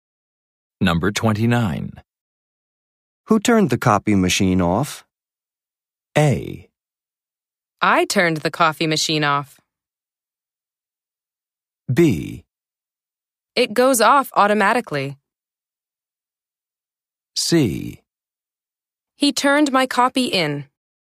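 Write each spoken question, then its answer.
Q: Who turned the copy machine off?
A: B: It goes off automatically.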